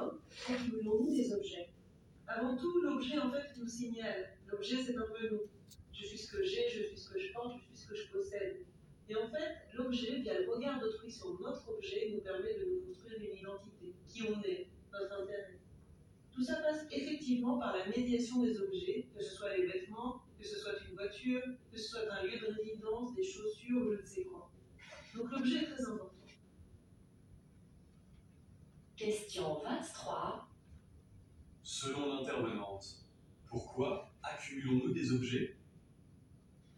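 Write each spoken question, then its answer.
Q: Selon l'intervenante, pourquoi accumulons-nous des objets ?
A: Parce que les objets nous signalent et, via le regard d'autrui, nous permettent de nous construire une identité.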